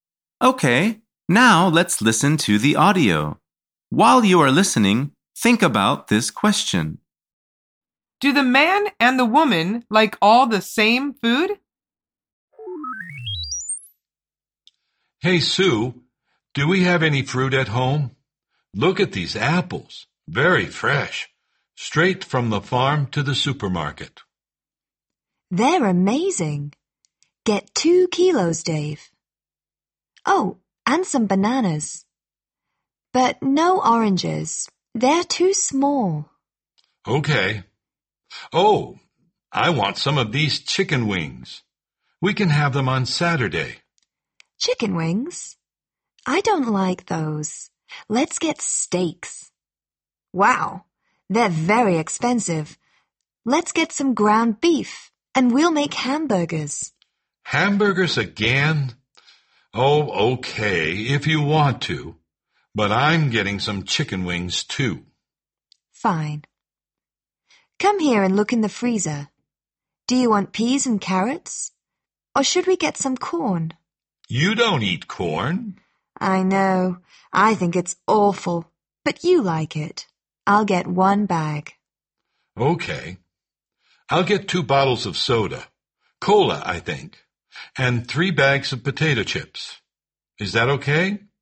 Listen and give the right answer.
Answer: The answer is no, they don't.